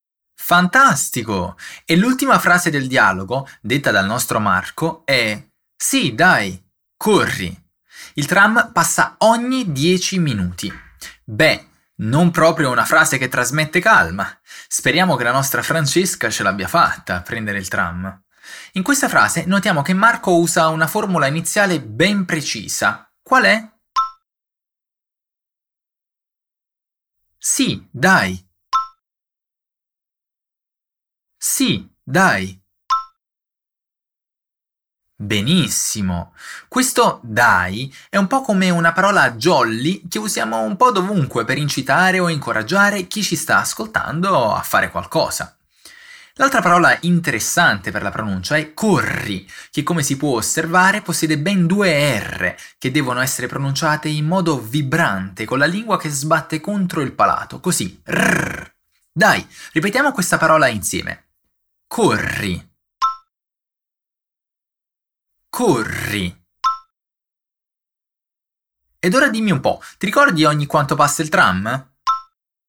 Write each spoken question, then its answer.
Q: Ed ora dimmi un po', ti ricordi ogni quanto passa il tram?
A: Ogni 10 minuti.